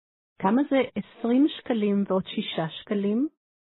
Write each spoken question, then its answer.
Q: כמה זה 20 שקלים ועוד 6 שקלים?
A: 26 שקלים.